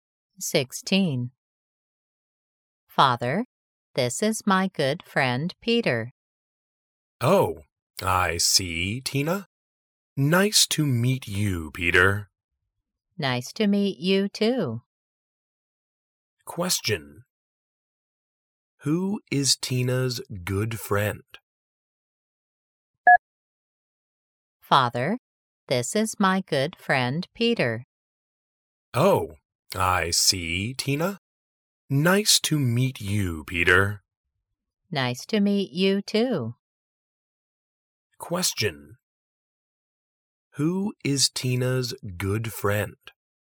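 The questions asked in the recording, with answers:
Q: Who is Tina's good friend?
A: Peter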